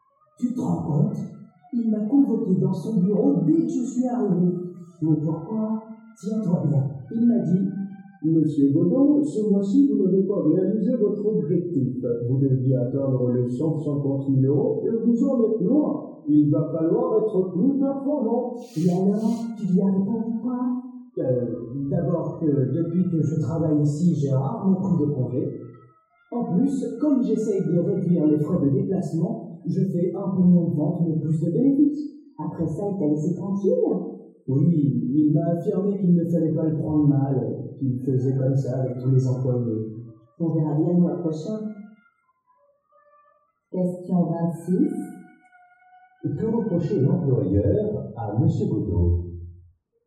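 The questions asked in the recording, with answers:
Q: Que reprocher l'employeur à M. Godot?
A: De ne pas avoir atteint son objectif de ventes du mois (150 000 euros)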